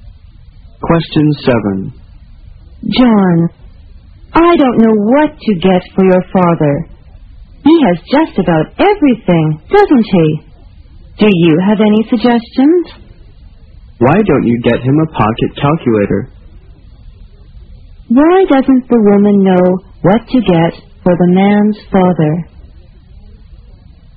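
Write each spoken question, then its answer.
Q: Why doesn't the woman know what to get for the man's father?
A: He has just about everything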